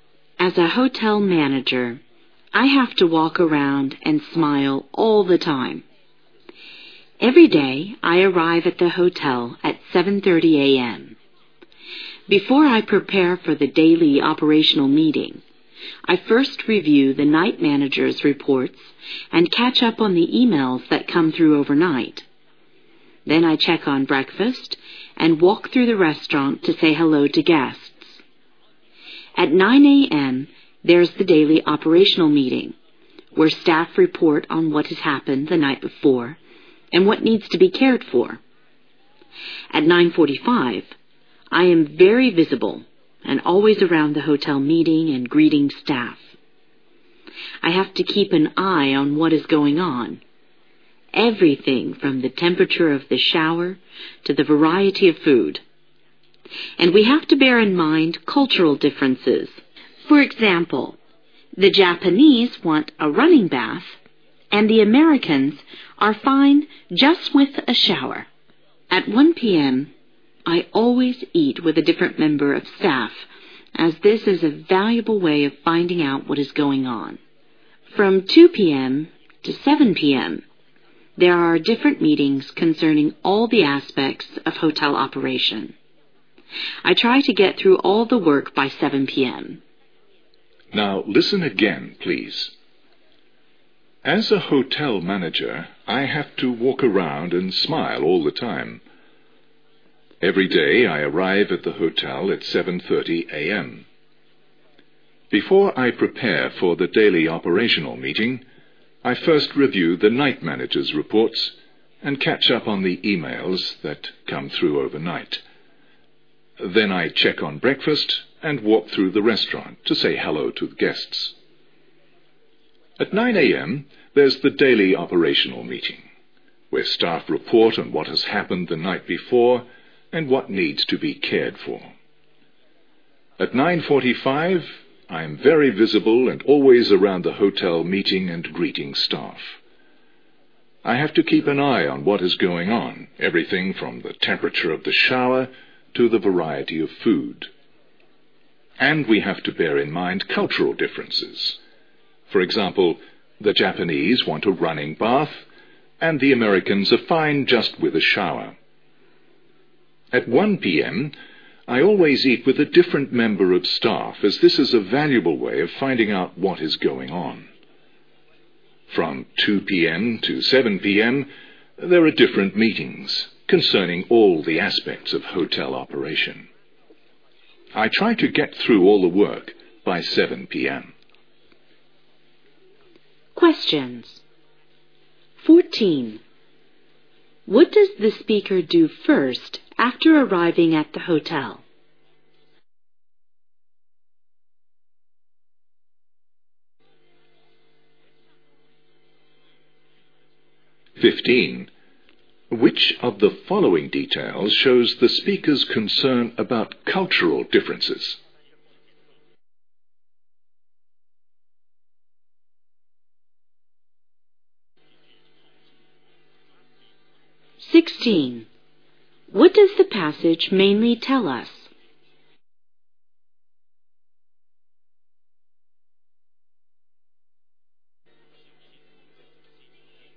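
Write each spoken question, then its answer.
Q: What does the speaker do first after arriving at the hotel?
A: Reviews the night manager's reports

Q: Which of the following details shows the speaker's concern about cultural differences?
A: The Japanese want a running bath, while Americans are fine with a shower

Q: What does the passage mainly tell us?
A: A hotel manager's daily routine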